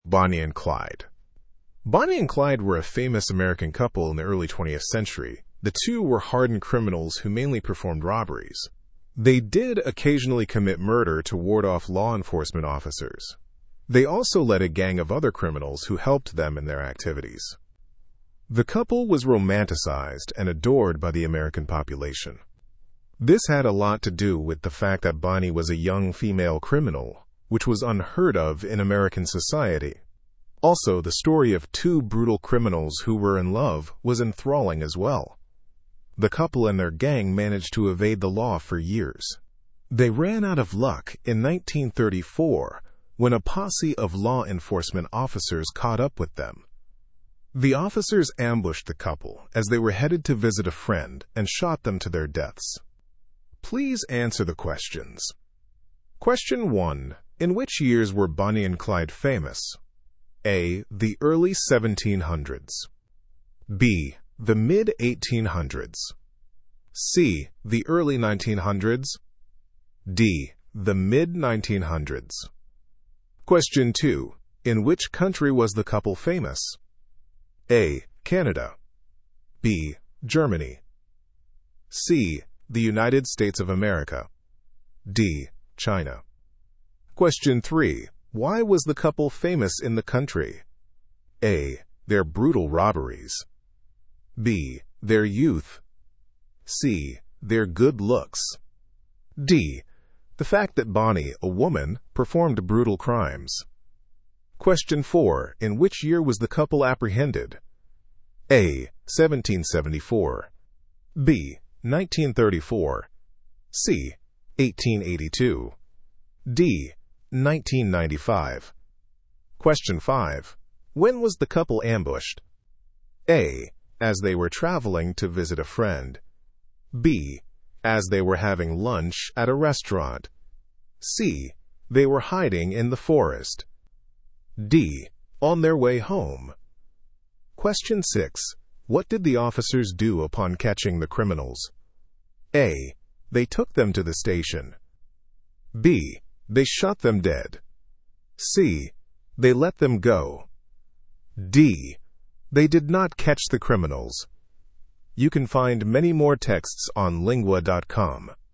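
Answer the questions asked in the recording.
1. C: The early 1900s.
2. C: The United States of America.
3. D: The fact that Bonnie, a woman, performed brutal crimes.
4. B: 1934.
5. A: As they were traveling to visit a friend.
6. B: They shot them dead.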